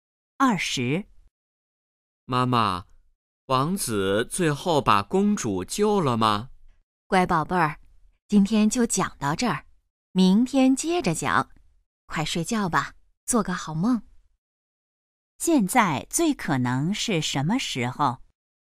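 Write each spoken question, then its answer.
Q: 现在最可能是什么时候?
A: 晚上睡觉前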